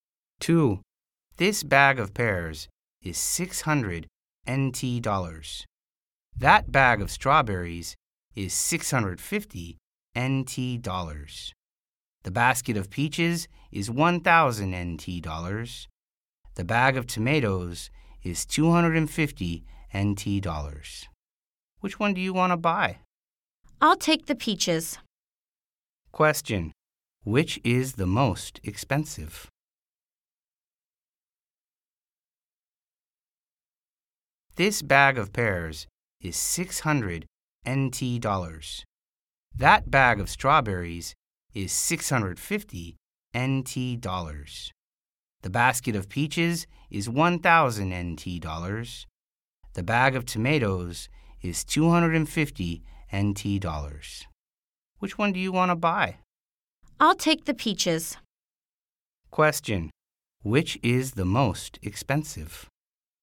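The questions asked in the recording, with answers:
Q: Which is the most expensive?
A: The basket of peaches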